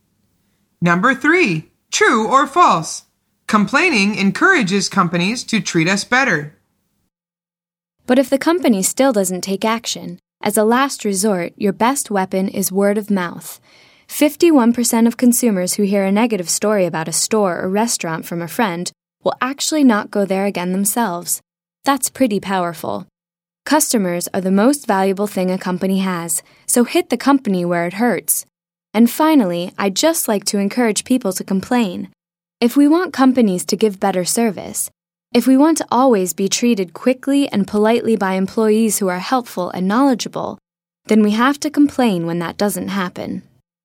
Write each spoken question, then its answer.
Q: True or false? Complaining encourages companies to treat us better.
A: The answer is true.